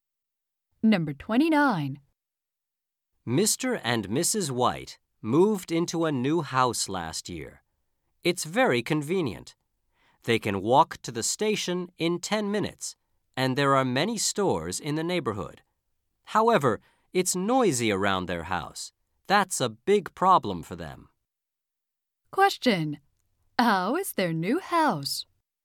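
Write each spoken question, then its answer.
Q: How is their new house?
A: Convenient but noisy.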